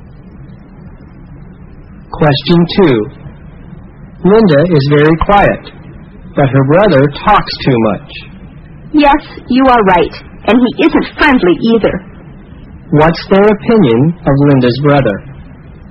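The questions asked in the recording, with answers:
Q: What's their opinion of Linda's brother?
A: He talks too much and isn't friendly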